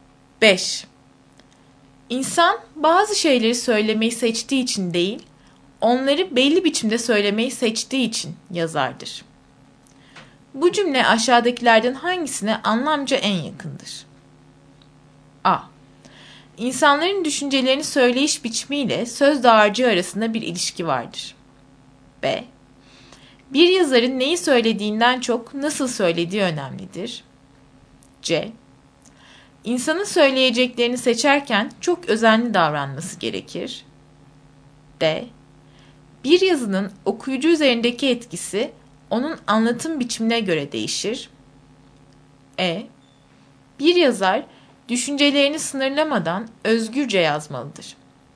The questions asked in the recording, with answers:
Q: Bu cümle aşağıdakilerden hangisine anlamca en yakındır?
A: Doğru cevap B.